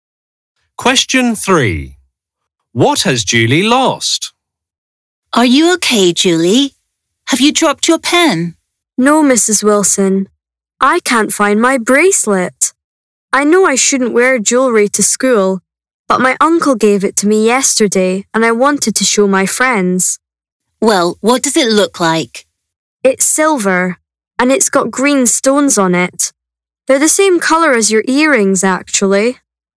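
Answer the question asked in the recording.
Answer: her bracelet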